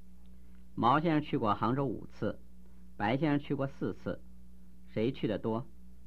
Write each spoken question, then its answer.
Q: 谁去的多?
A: 毛先生去的多。